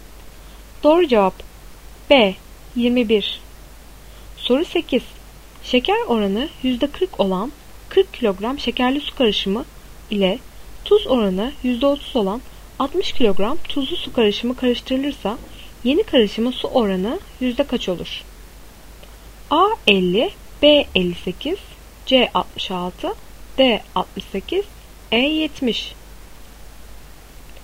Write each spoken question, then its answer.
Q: Şeker oranı %40 olan 40 kilogram şekerli su karışımı ile tuz oranı %30 olan 60 kilogram tuzlu su karışımı karıştırılırsa yeni karışımın su oranı yüzde kaç olur?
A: Doğru cevap C 66.